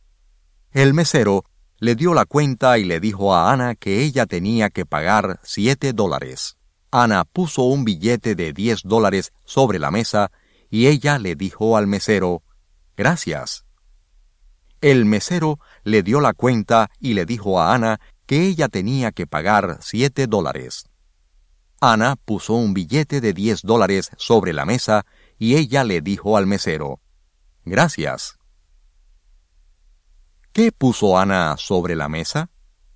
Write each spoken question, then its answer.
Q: ¿Qué puso Ana sobre la mesa?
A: Ana puso un billete de $10 sobre la mesa.